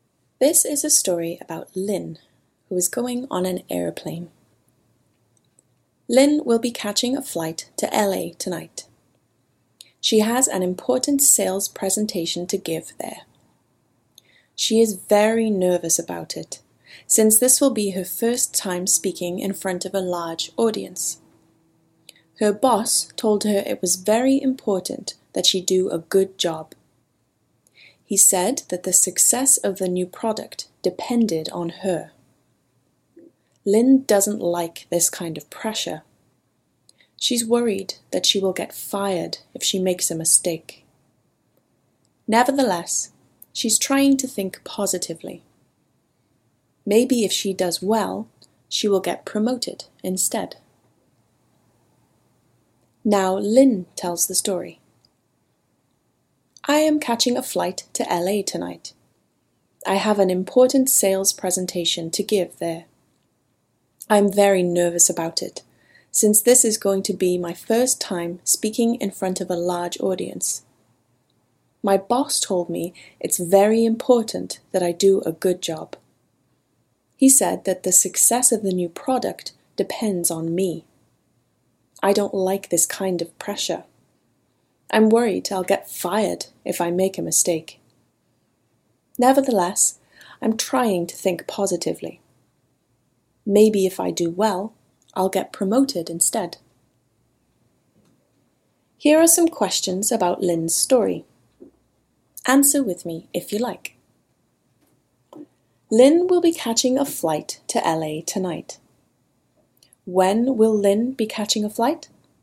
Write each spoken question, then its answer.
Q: When will Lynn be catching a flight?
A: Lynn will be catching a flight to LA tonight.